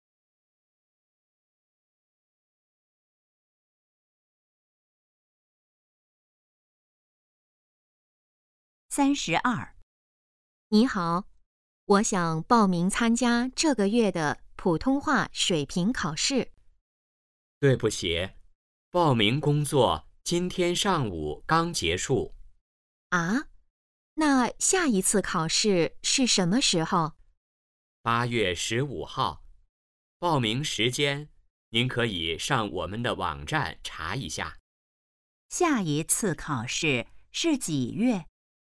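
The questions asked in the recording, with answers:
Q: 下一次考试是几月?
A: 8月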